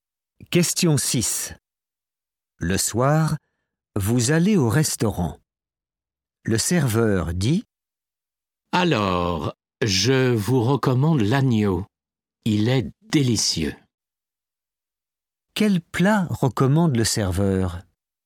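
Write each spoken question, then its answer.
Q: Quel plat recommande le serveur?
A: l'agneau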